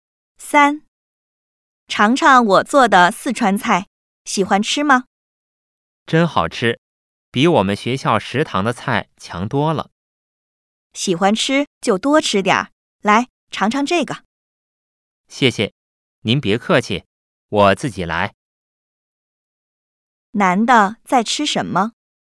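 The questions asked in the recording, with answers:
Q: 男的在吃什么?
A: 四川菜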